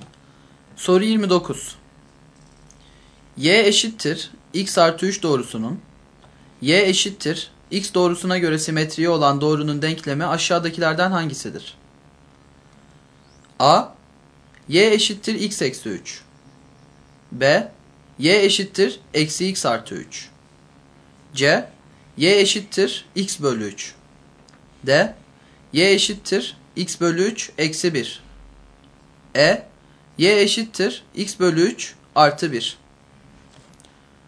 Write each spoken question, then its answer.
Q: Y eşittir x artı 3 doğrusunun, y eşittir x doğrusuna göre simetriği olan doğrunun denklemi aşağıdakilerden hangisidir?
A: Doğru yanıt A şıkkı.